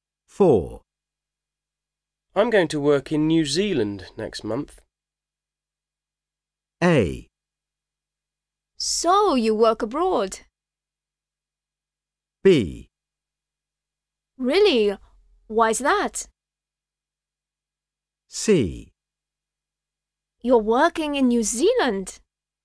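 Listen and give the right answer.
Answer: B: Really? Why is that?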